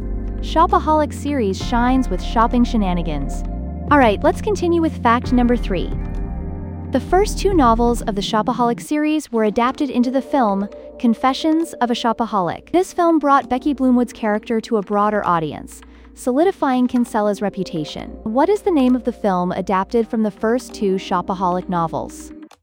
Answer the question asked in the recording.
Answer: Confessions of a Shopaholic.